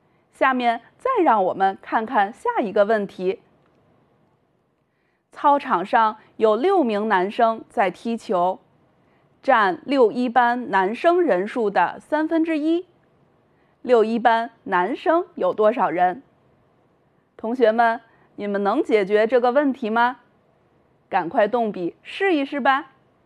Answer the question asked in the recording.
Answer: 用6除以1/3,结果是18人